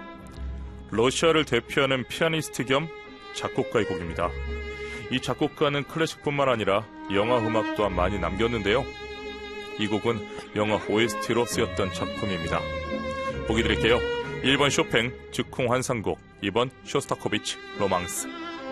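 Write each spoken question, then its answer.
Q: 이 곡은 영화 OST로 쓰였던 작품입니다. 보기 드릴게요. 1번 쇼팽 즉흥 환상곡, 2번 쇼스타코비치 로망스.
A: 2: 쇼스타코비치 로망스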